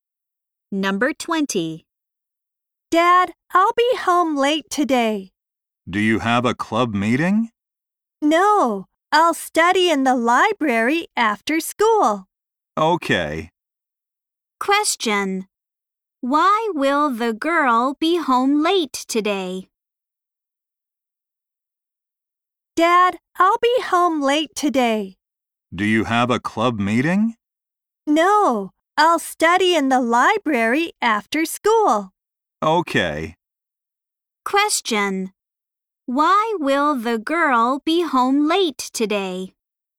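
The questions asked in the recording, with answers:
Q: Why will the girl be home late today?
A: She will study in the library after school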